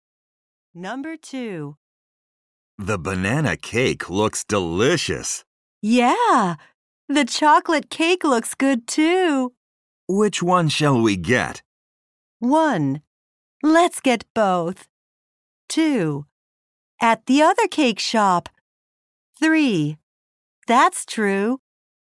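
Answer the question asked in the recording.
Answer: 1: Let's get both.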